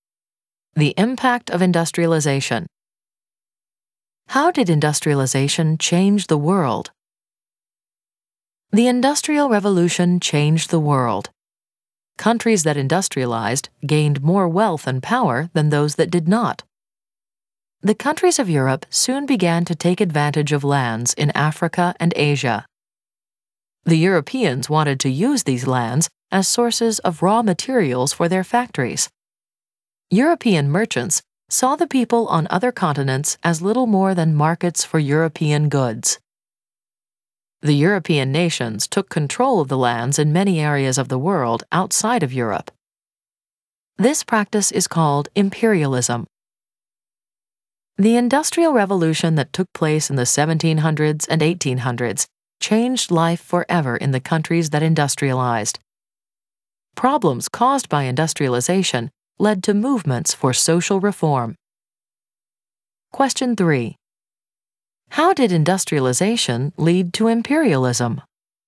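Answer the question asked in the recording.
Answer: Industrialized nations took over lands in Africa and Asia to get raw materials and markets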